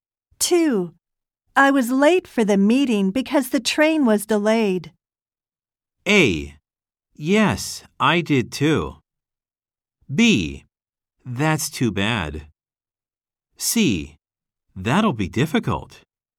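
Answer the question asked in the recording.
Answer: B: That's too bad.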